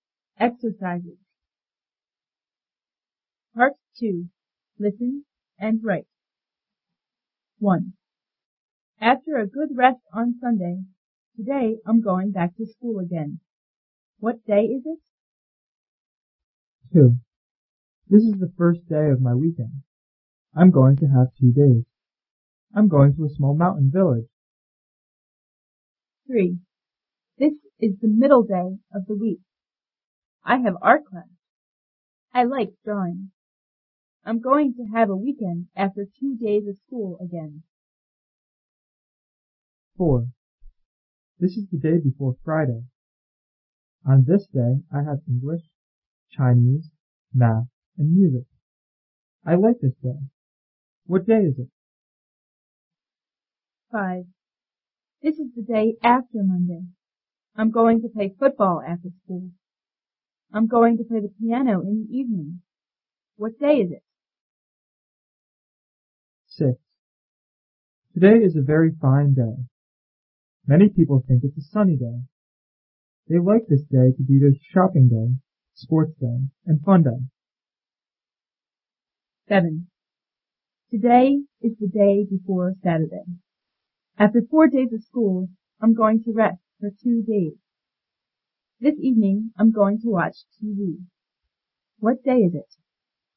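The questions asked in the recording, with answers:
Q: What day is it?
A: Monday

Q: What day is it?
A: Thursday

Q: What day is it?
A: Tuesday

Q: What day is it?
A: Friday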